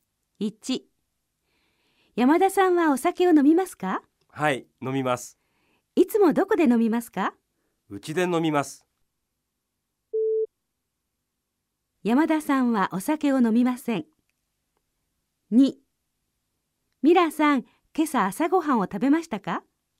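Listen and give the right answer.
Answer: ×(違います。山田さんはお酒を飲みます)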